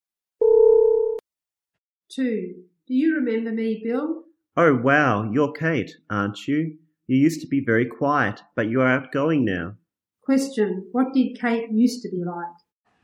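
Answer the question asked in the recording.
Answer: Very quiet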